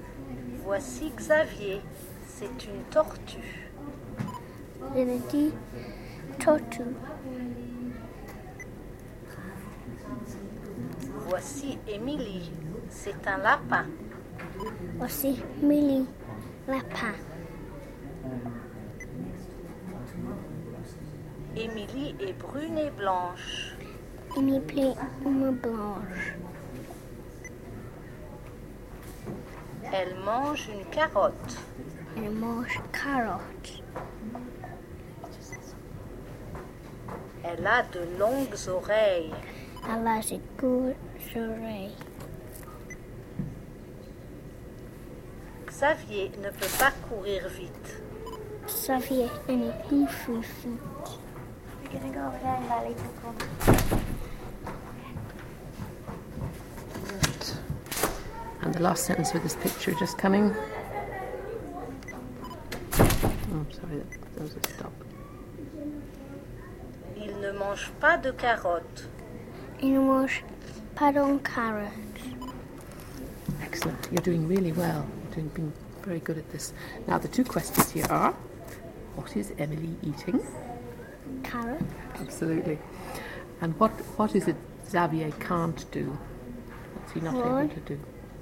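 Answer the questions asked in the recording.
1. A carrot
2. Run fast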